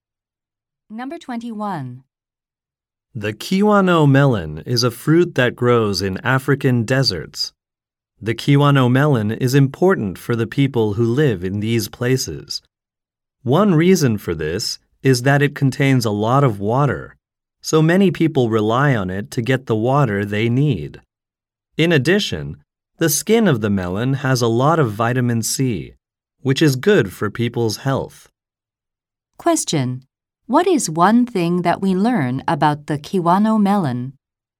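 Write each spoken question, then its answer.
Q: What is one thing that we learn about the Kiwano melon?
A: It contains a lot of water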